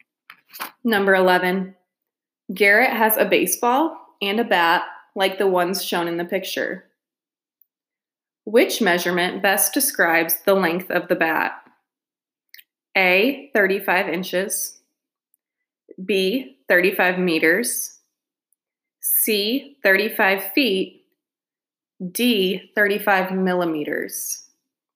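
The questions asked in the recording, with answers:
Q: Which measurement best describes the length of the bat?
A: A: 35 inches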